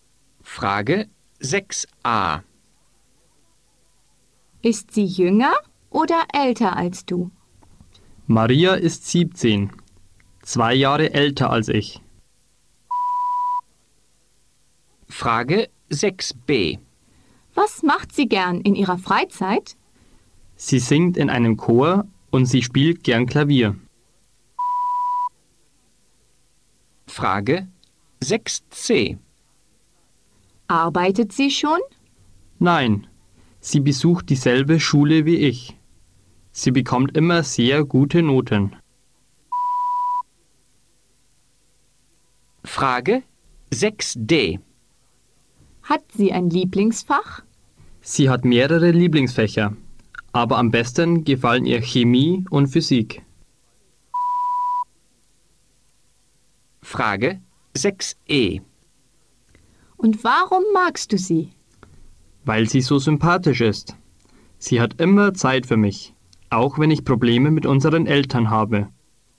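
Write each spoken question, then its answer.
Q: Ist sie jünger oder älter als du?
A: älter (17, zwei Jahre älter)

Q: Was macht sie gern in ihrer Freizeit?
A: Sie singt im Chor und spielt Klavier

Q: Arbeitet sie schon?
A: Nein, sie geht noch zur Schule

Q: Hat sie ein Lieblingsfach?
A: Chemie und Physik

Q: Und warum magst du sie?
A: Weil sie sympathisch ist und immer Zeit für ihn hat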